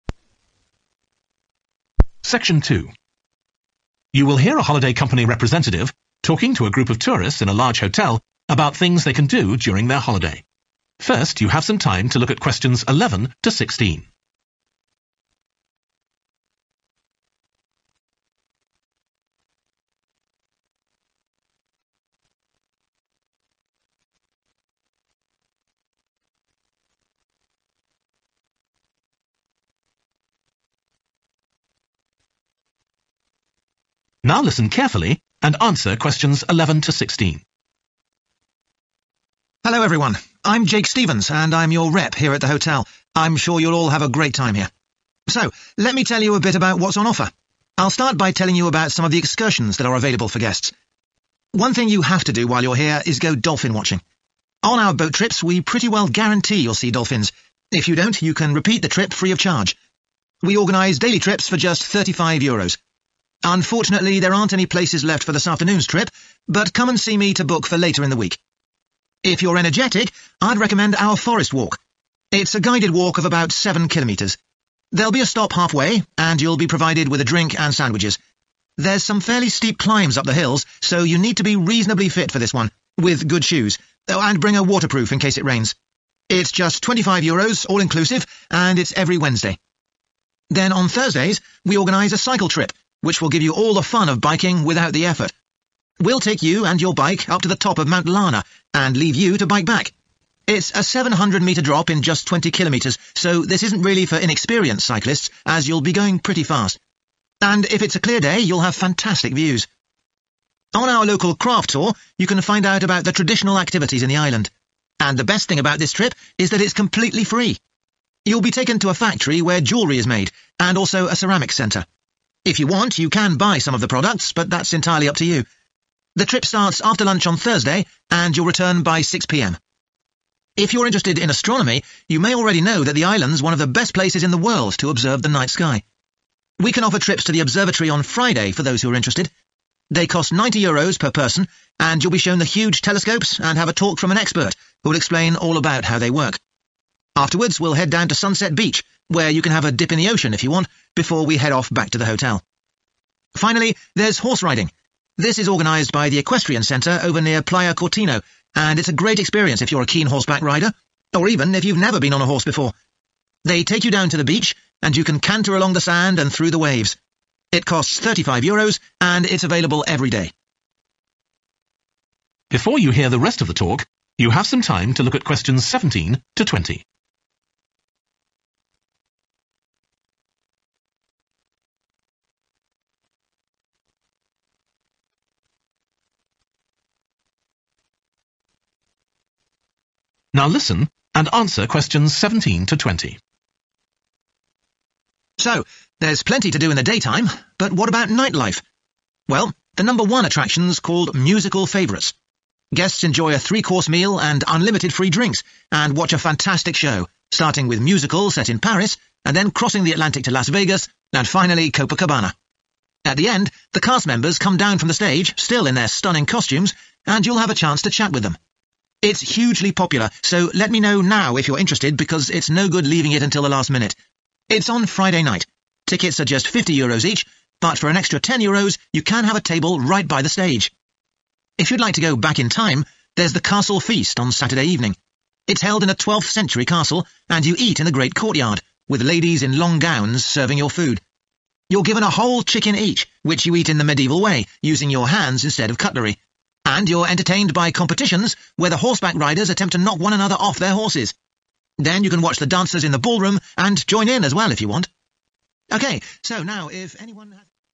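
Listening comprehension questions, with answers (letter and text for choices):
Choose SIX answers from the box and write the correct letter, A-H, next to Questions 11-16.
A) all downhill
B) suitable for beginners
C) only in good weather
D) food included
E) no charge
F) swimming possible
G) fully booked today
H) transport not included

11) dolphin watching ....................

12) forest walk ....................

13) cycle trip ....................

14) local craft tour ....................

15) observatory trip ....................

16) horse riding ....................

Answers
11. G) fully booked today
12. D) food included
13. A) all downhill
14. E) no charge
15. F) swimming possible
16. B) suitable for beginners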